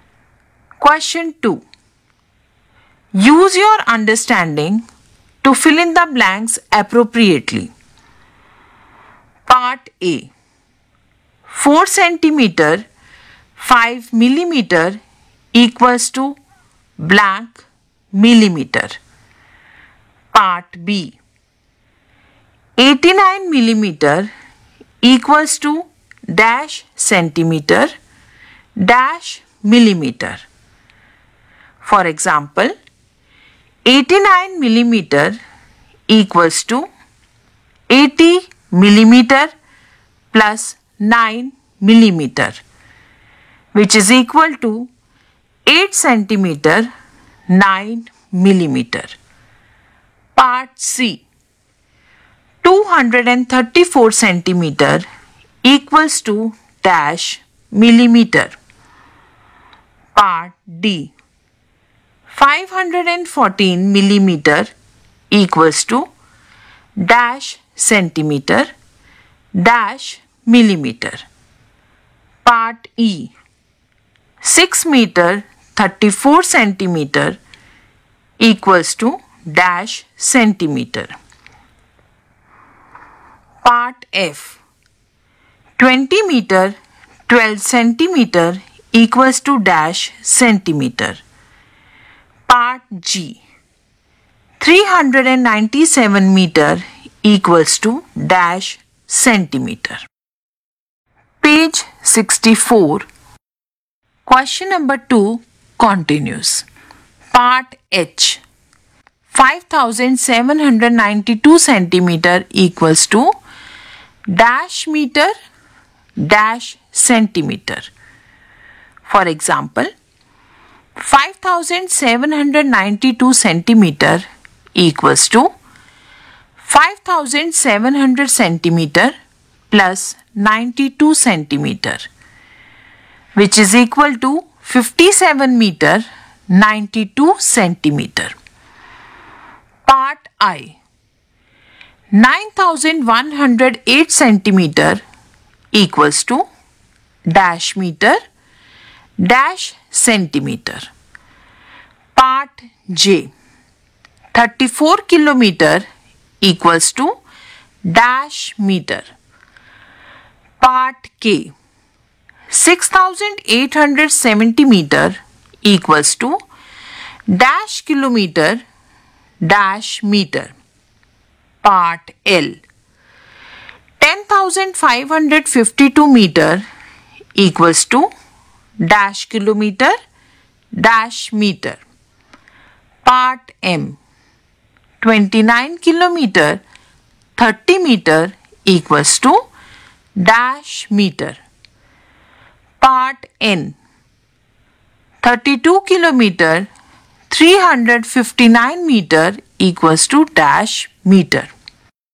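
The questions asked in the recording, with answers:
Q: 4 centimeter 5 millimeter equals to blank millimeter.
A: 45 millimeter

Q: 234 centimeter equals to dash millimeter.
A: 2340 millimeter

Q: 514 millimeter equals to dash centimeter dash millimeter.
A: 51 centimeter 4 millimeter

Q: 6 meter 34 centimeter equals to dash centimeter.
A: 634 centimeter

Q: 20 meter 12 centimeter equals to dash centimeter.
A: 2012 centimeter

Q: 397 meter equals to dash centimeter.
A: 39700 centimeter

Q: 9108 centimeter equals to dash meter dash centimeter.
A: 91 meter 8 centimeter

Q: 34 kilometer equals to dash meter.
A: 34000 meter

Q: 10552 meter equals to dash kilometer dash meter.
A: 10 kilometer 552 meter

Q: 29 kilometer 30 meter equals to dash meter.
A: 29030 meter

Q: 32 kilometer 359 meter equals to dash meter.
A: 32359 meter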